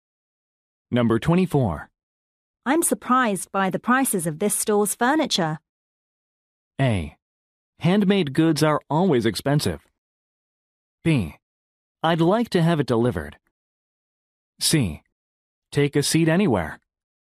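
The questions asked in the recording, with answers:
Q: I'm surprised by the prices of this store's furniture.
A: A: Handmade goods are always expensive.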